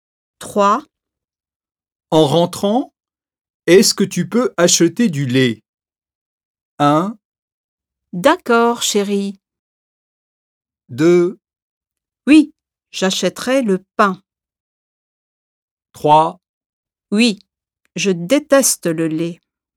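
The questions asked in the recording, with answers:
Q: En rentrant, est-ce que tu peux acheter du lait?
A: 1: D'accord, chérie.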